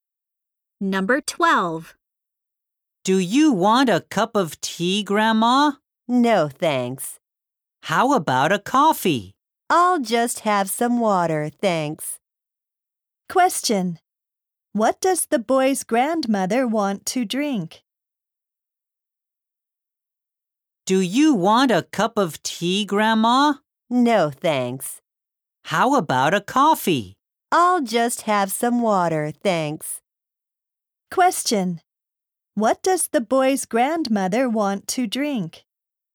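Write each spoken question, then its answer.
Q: What does the boy's grandmother want to drink?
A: Water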